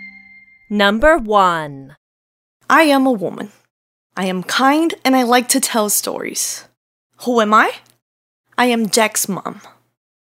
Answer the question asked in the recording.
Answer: I am Jack's mom.